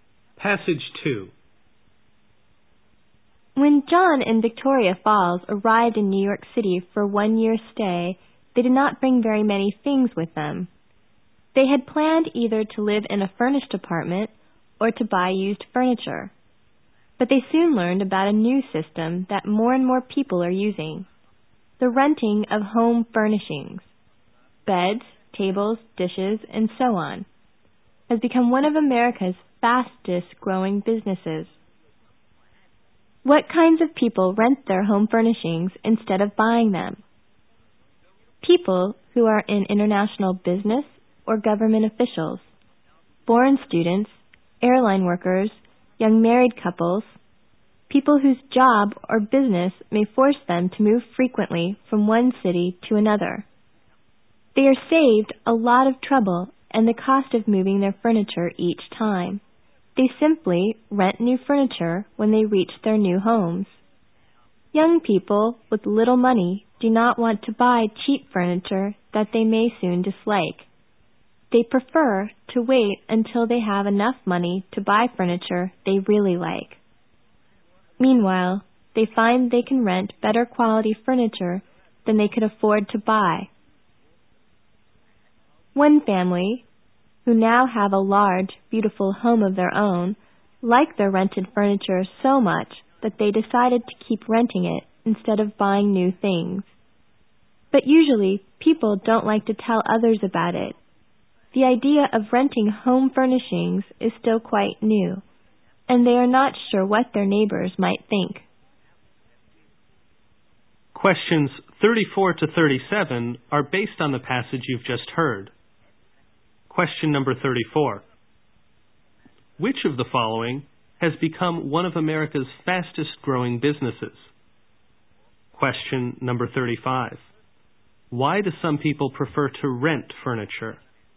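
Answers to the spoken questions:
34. Renting home furnishings
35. They move often, or they can rent better furniture than they can afford to buy.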